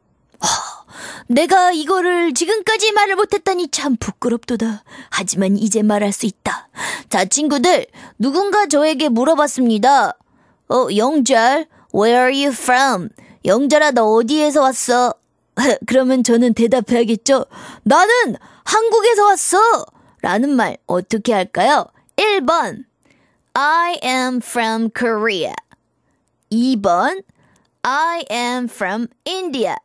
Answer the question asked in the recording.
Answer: 당연히 한국이니까 1번 I'm from Korea 이렇게 말해야 되겠죠.